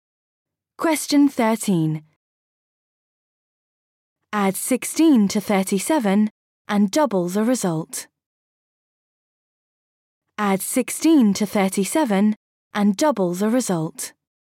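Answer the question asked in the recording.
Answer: 106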